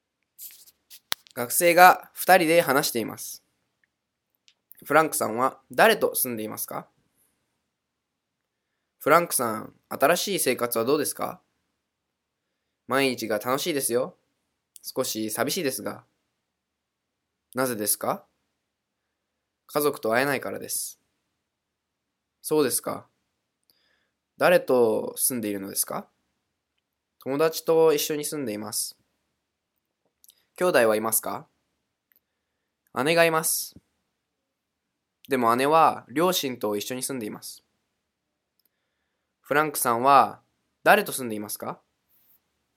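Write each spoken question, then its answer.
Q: フランクさんは誰と住んでいますか?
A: 友達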